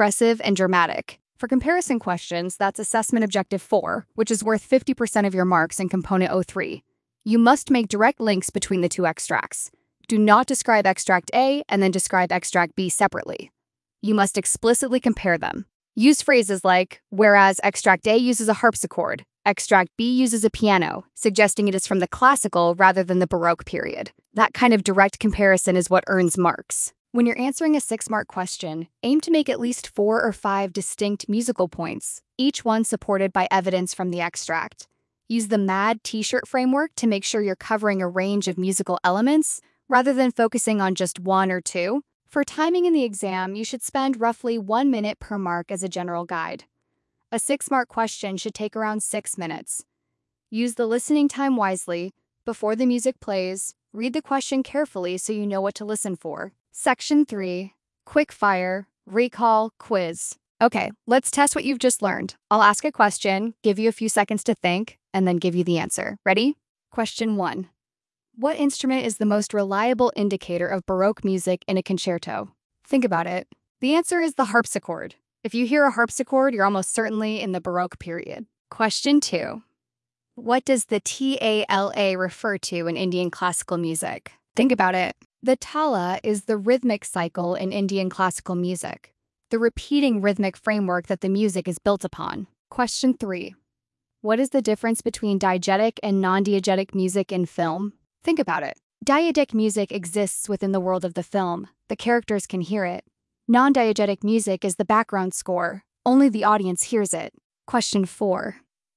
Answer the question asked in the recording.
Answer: You must make direct links between the two extracts, not describe them separately.